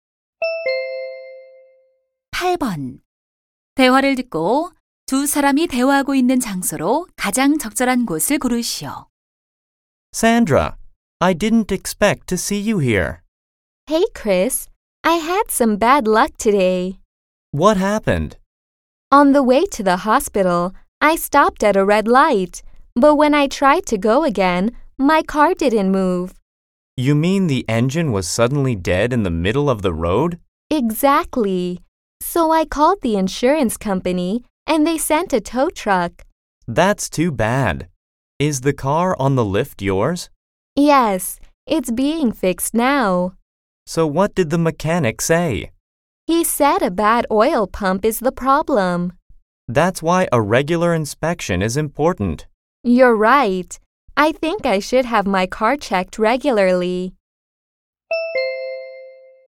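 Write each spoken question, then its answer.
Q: 대화를 듣고 두 사람이 대화하고 있는 장소로 가장 적절한 곳을 고르시오.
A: 자동차 정비소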